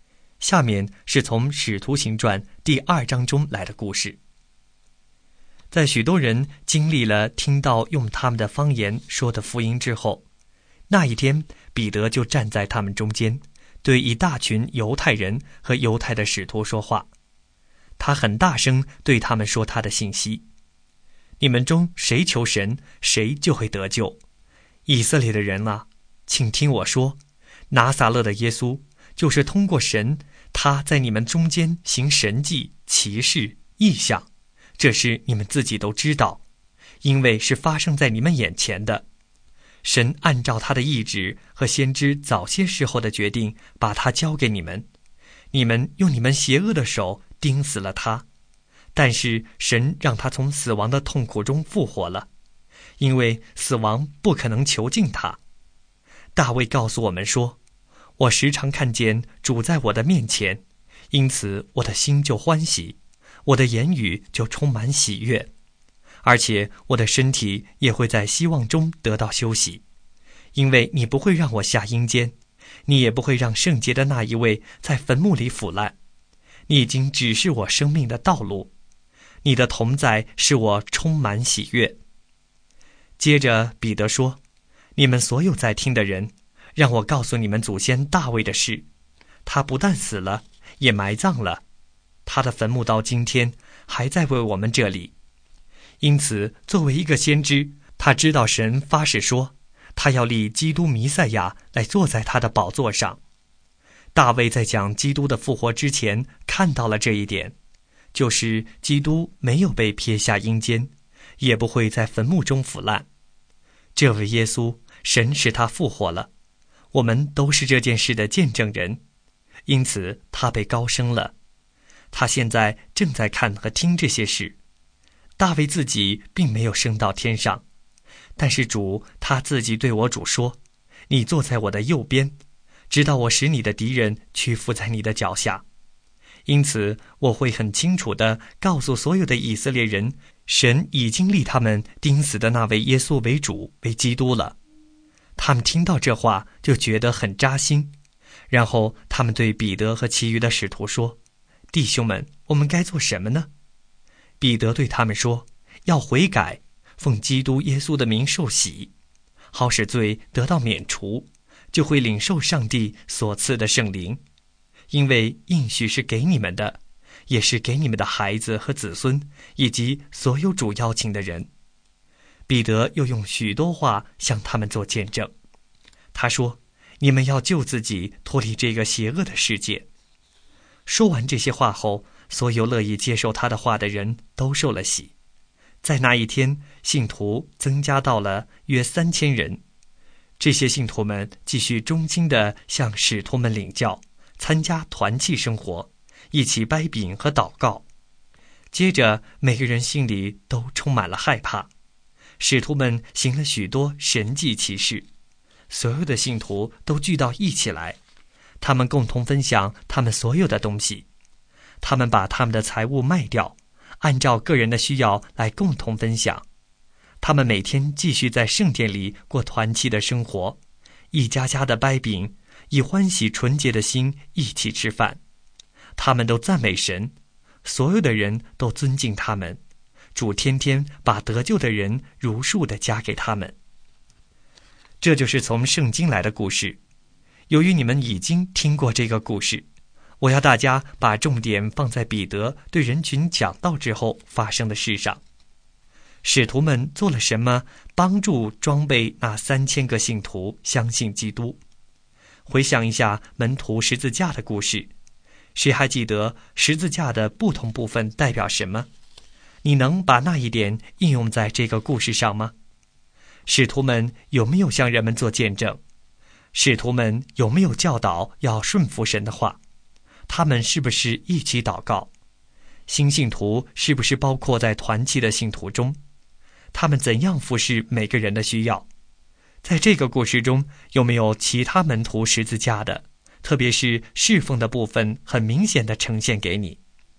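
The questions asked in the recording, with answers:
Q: 使徒们有没有向人们做见证?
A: 有,彼得用许多话向他们做见证

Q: 他们是不是一起祷告?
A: 是,他们一起掰饼和祷告

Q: 新信徒是不是包括在团契的信徒中?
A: 是,他们参加团契生活

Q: 他们怎样服侍每个人的需要?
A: 把财物卖掉,按照个人的需要共同分享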